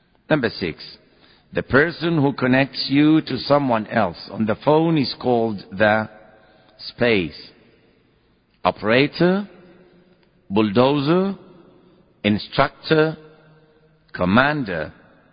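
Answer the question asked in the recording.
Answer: A: operator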